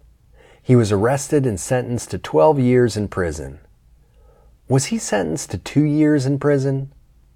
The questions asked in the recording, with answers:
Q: Was he sentenced to 2 years in prison?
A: No, he wasn't sentenced to 2 years in prison.